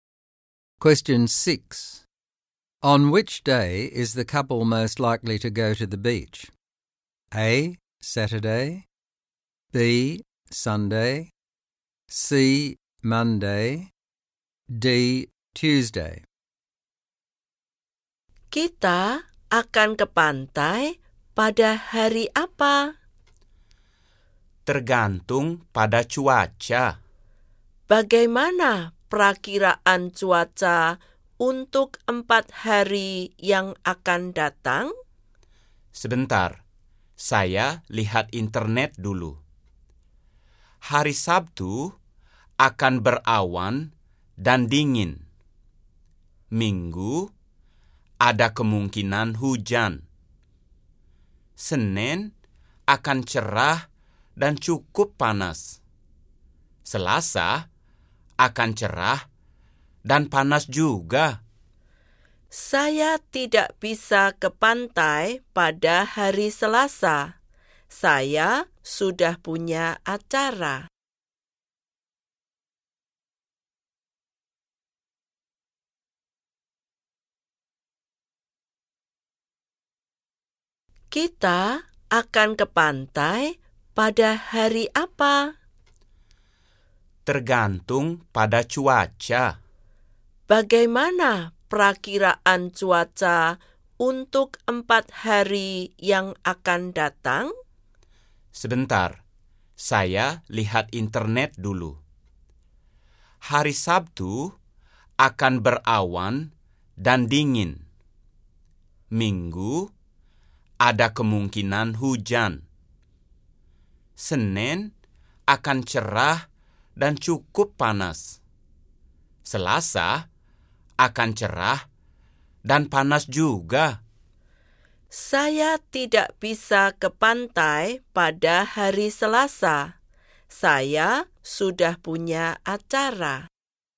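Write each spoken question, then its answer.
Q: On which day is the couple most likely to go to the beach?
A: C: Monday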